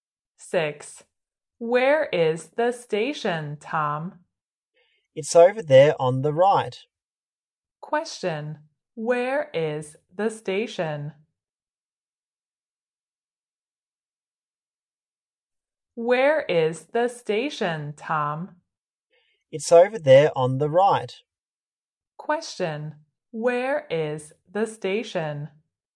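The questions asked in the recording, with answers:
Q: Question, where is the station?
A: Over there on the right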